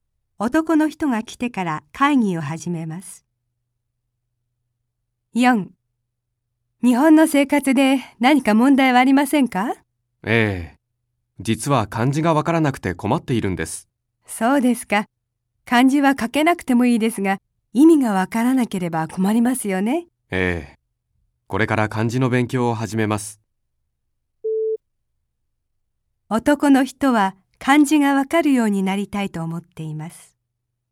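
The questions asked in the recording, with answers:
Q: 男の人は漢字がわかるようになりたいと思っています。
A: ○(正しい)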